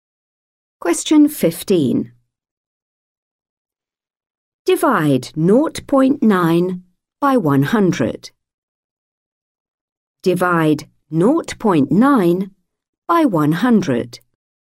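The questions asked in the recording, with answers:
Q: Divide 0.9 by 100.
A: 0.009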